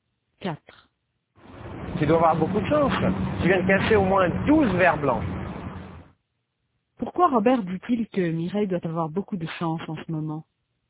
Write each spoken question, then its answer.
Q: Pourquoi Robert dit-il que Mireille doit avoir beaucoup de chance en ce moment?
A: Parce qu'elle vient de casser 12 verres blancs.